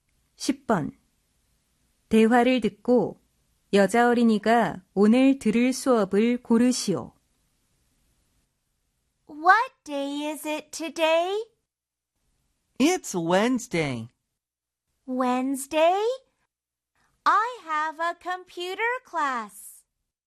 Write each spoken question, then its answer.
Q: 대화를 듣고 여자 어린이가 오늘 들을 수업을 고르시오.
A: Computer class 하면은 컴퓨터 수업이 있다 이런 뜻이 되겠죠.